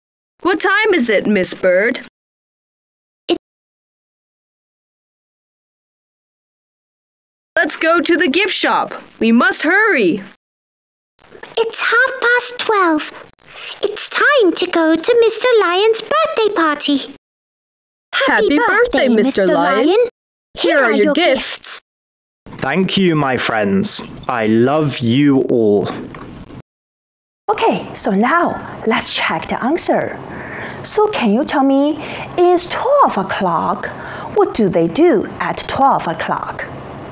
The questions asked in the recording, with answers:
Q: What do they do at 12:00?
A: They will go to the gift shop.